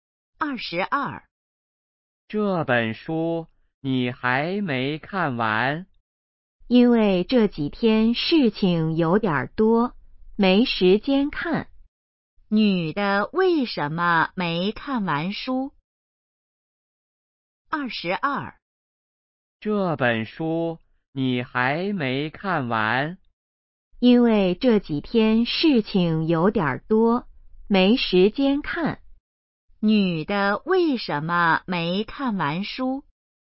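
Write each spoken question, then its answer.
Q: 女的为什么没看完书?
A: 这几天事情多,没时间看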